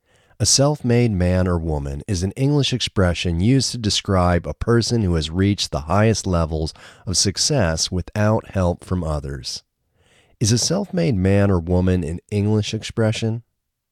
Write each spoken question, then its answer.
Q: Is a self-made man or woman an English expression?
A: Yes, a self-made man or woman is an English expression.